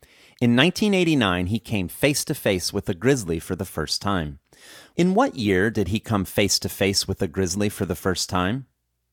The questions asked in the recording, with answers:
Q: In what year did he come face to face with a grizzly for the first time?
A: He came face to face with a grizzly for the first time in 1989.